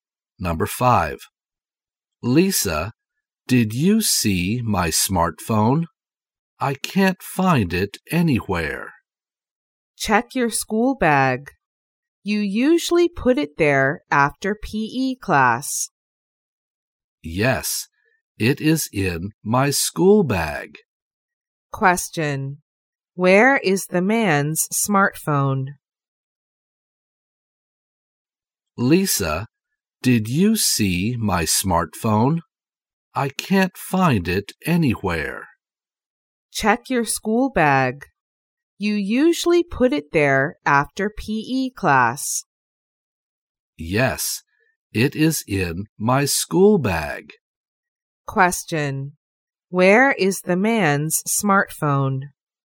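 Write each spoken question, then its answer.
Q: Where is the man's smartphone?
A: In his school bag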